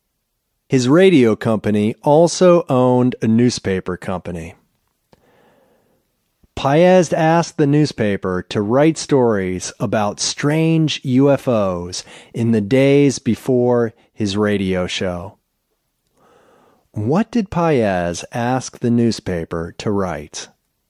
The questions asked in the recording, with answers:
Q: What did Paez ask the newspaper to write?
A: Paez asked the newspaper to write stories about strange UFOs.